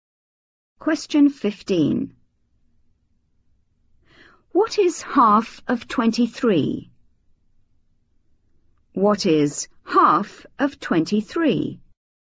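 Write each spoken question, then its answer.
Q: What is half of 23?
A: 11.5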